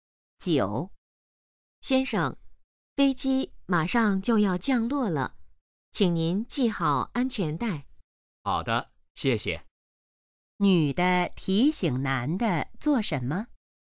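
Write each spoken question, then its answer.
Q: 女的提醒男的做什么?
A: 系好安全带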